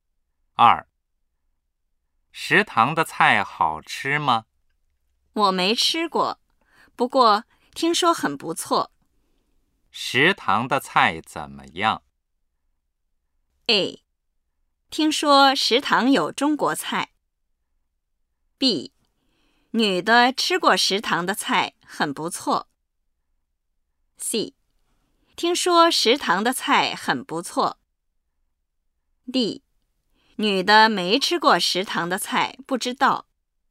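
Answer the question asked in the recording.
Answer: C: 听说食堂的菜很不错。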